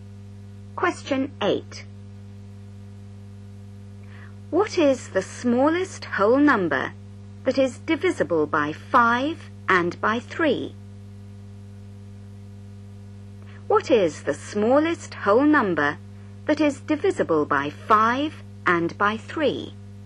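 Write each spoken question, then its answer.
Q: What is the smallest whole number that is divisible by 5 and by 3?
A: 15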